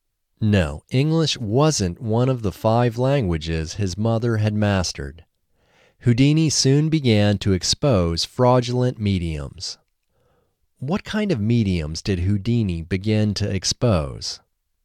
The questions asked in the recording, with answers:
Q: What kind of mediums did Houdini begin to expose?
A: Houdini began to expose fraudulent mediums.